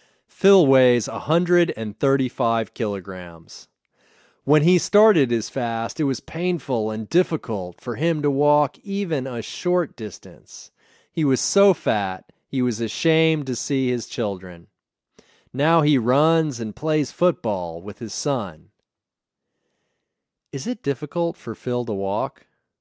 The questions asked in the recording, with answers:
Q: Is it difficult for Phil to walk?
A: No, it's not difficult for Phil to walk.